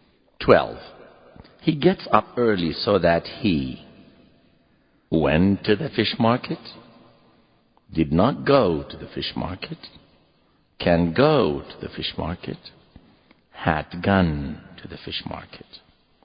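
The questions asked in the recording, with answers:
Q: He gets up early so that he went to the fish market, did not go to the fish market, can go to the fish market, had gun to the fish market.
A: C: can go to the fish market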